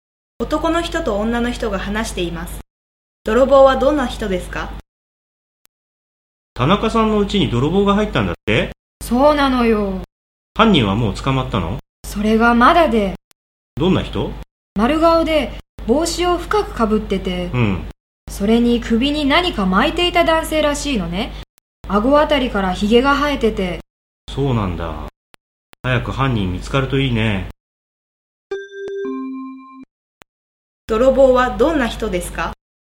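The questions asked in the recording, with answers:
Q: 泥棒はどんな人ですか?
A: 丸顔で帽子を深くかぶり、首に何か巻いていて、顎からヒゲが生えている男性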